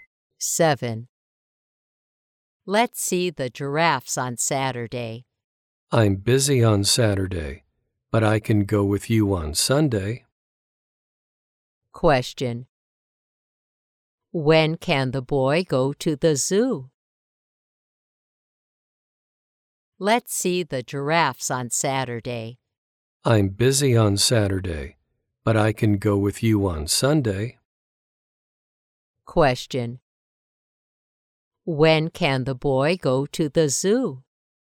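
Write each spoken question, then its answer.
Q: When can the boy go to the zoo?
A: On Sunday.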